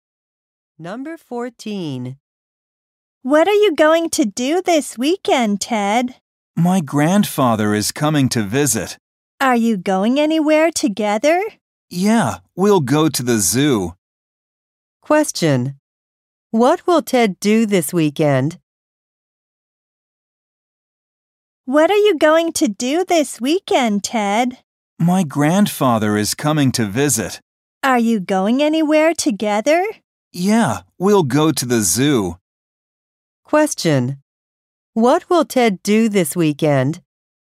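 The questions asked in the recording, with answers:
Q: What will Ted do this weekend?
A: Go to the zoo with his grandfather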